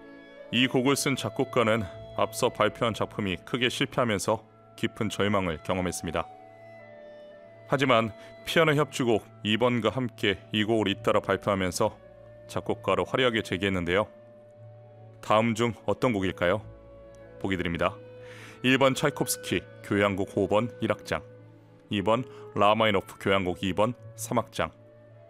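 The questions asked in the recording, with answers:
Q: 다음 중 어떤 곡일까요?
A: 2: 라흐마니노프 교향곡 2번 3악장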